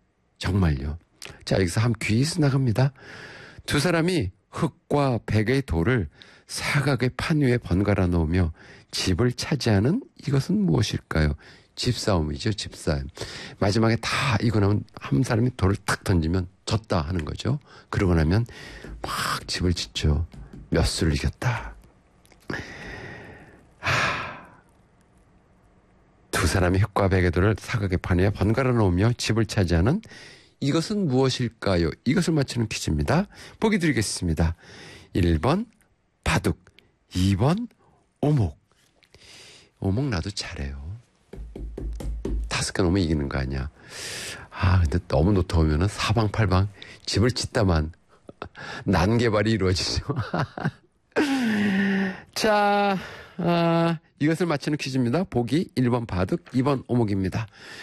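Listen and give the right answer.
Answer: 1: 바둑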